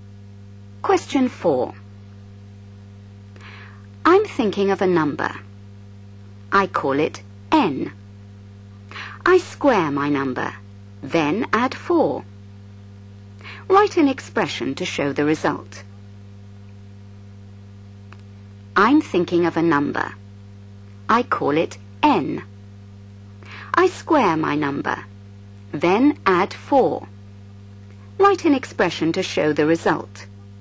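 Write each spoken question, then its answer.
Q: Write an expression to show the result.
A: n2 + 4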